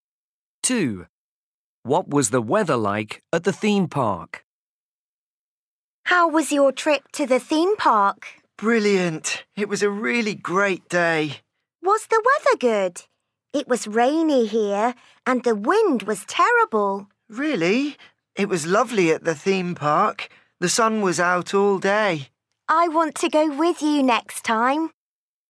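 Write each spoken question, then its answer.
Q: What was the weather like at the theme park?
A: Sunny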